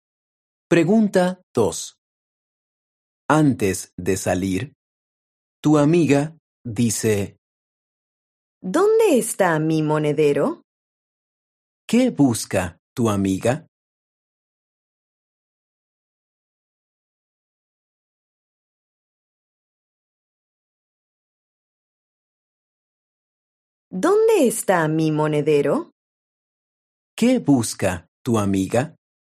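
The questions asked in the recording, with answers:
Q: ¿Qué busca tu amiga?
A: su monedero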